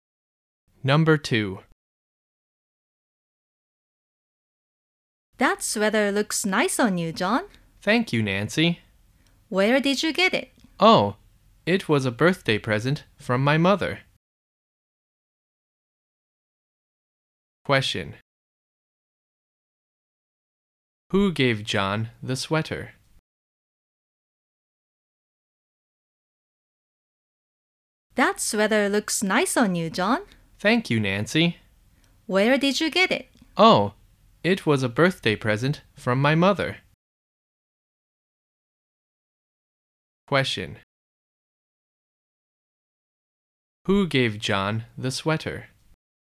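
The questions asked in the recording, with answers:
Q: Who gave John the sweater?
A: His mother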